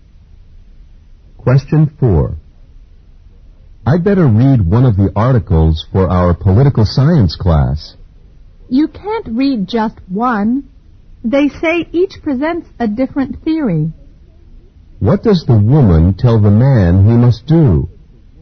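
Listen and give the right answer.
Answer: Read all the articles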